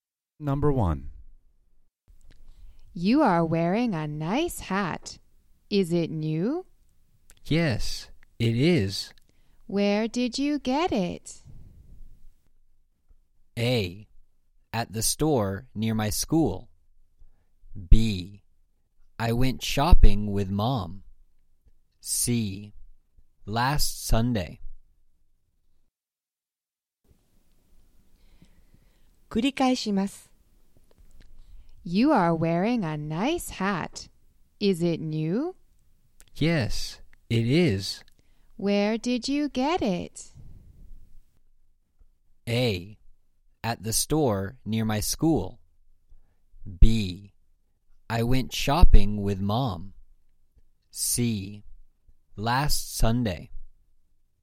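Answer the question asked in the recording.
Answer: A: At the store near my school.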